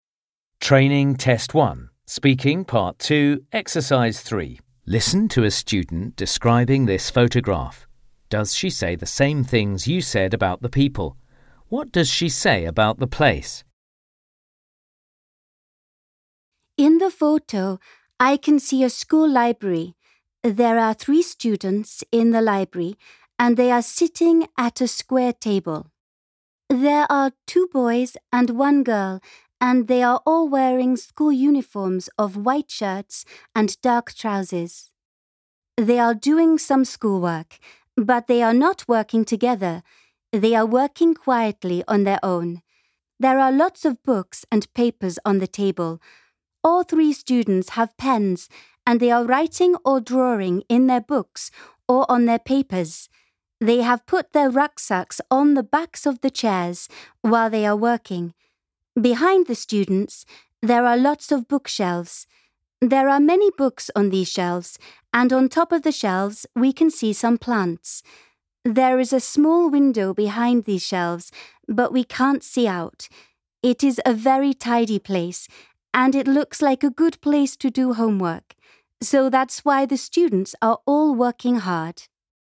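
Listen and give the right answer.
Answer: It is a school library; it is very tidy and looks like a good place to do homework.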